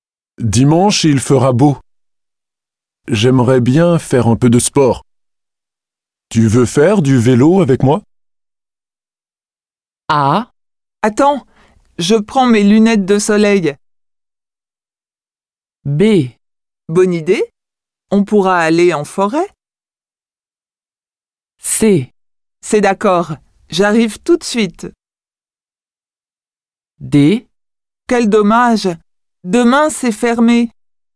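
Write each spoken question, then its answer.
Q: Tu veux faire du vélo avec moi?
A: B: Bonne idée, on pourra aller en forêt?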